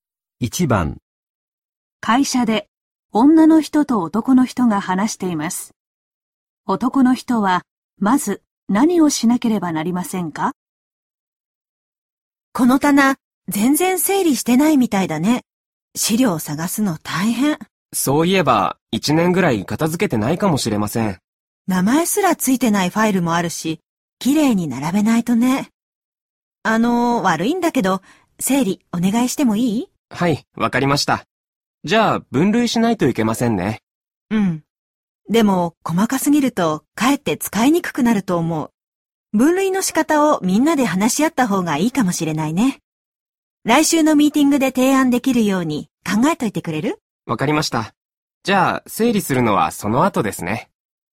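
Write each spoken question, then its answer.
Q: 男の人はまず何をしなければなりませんか?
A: ミーティングで提案するため、資料の分類の仕方を考える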